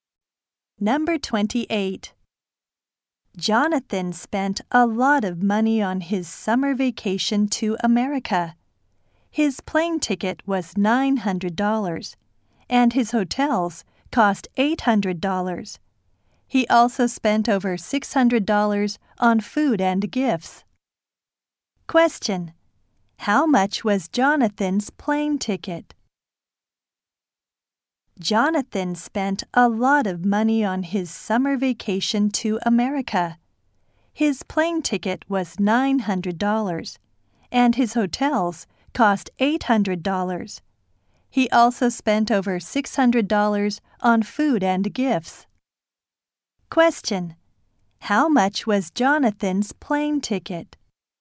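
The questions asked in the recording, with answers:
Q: How much was Jonathan's plane ticket?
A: $900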